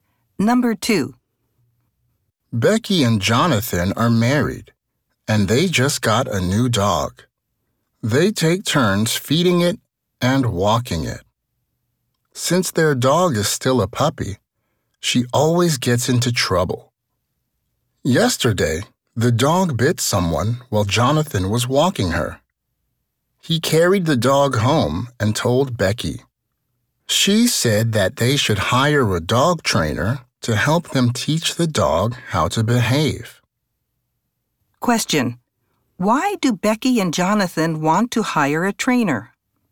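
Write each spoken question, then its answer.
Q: Why do Becky and Jonathan want to hire a trainer?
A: To teach their puppy how to behave, because she bit someone.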